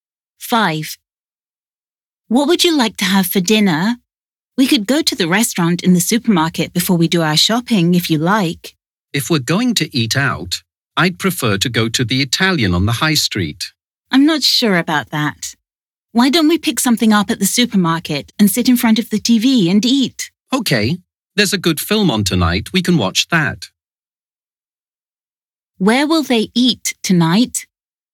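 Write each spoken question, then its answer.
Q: Where will they eat tonight?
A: at home in front of the TV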